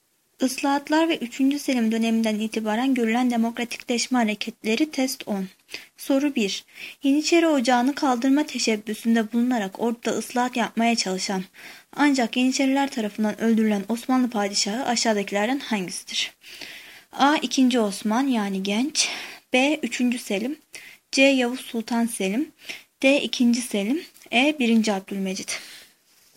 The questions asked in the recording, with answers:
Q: Yeniçeri Ocağı'nı kaldırma teşebbüsünde bulunarak orduda ıslahat yapmaya çalışan ancak Yeniçeriler tarafından öldürülen Osmanlı padişahı aşağıdakilerden hangisidir?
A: Cevap A. 2. Osman.